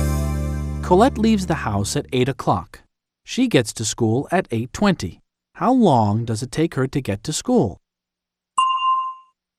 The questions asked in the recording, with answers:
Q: How long does it take her to get to school?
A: It takes her 20 minutes. It takes her 20 minutes to get to school.